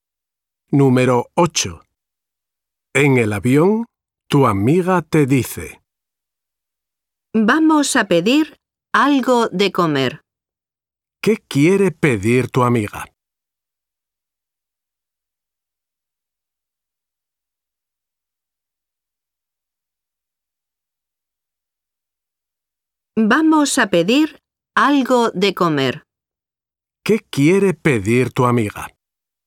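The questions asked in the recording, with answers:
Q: ¿Qué quiere pedir tu amiga?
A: algo de comer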